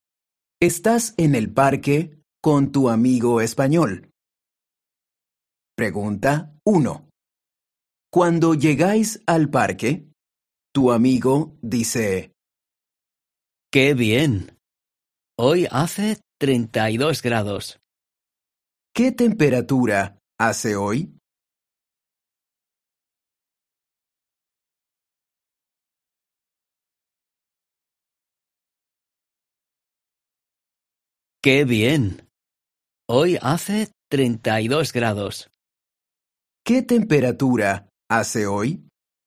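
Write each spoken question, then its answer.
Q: ¿Qué temperatura hace hoy?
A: 32 grados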